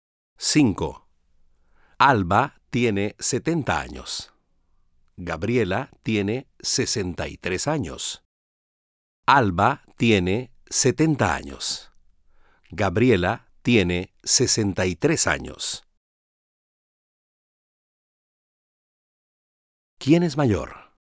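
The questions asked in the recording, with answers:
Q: ¿Quién es mayor?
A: Alba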